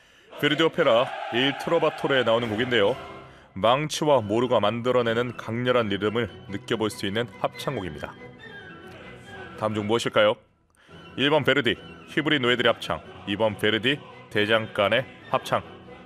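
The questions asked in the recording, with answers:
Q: 다음 중 무엇일까요? 1번 베르디 히브리 노예들의 합창, 2번 베르디 대장간의 합창.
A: 2: 베르디 대장간의 합창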